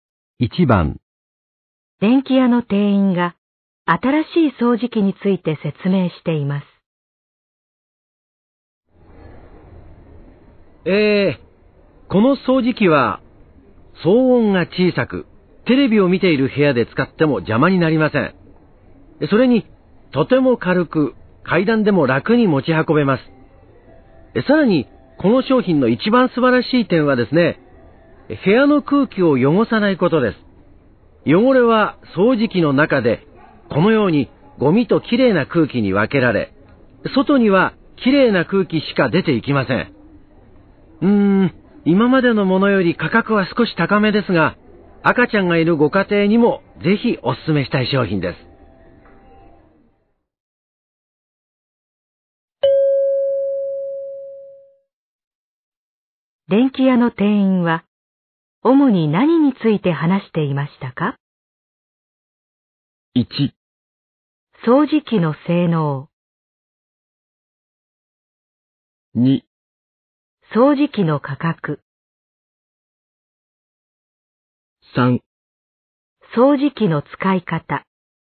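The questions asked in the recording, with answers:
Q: 電気屋の店員は、主に何について話していましたか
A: 1: 掃除機の性能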